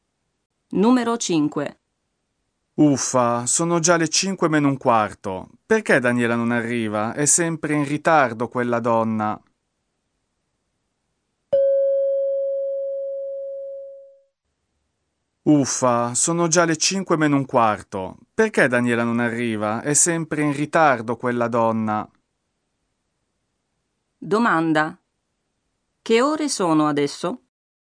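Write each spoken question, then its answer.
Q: Che ore sono adesso?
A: Sono le cinque meno un quarto (16:45).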